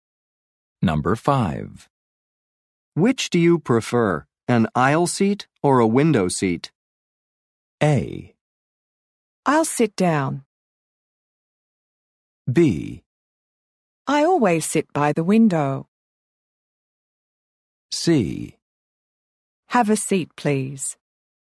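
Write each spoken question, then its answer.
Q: Which do you prefer, an aisle seat or a window seat?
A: B: I always sit by the window.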